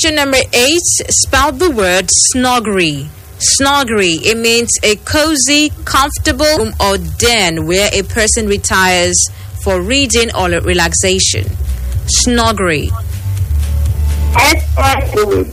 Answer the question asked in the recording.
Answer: S-N-U-G-G-E-R-Y. That's the correct spelling.